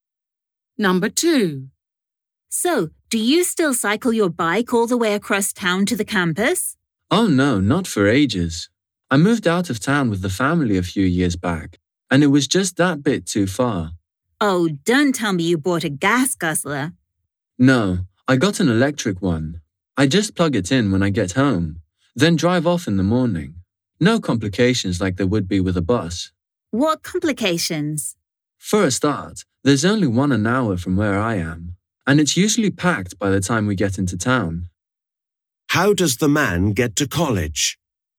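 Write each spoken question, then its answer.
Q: How does the man get to college?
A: By electric car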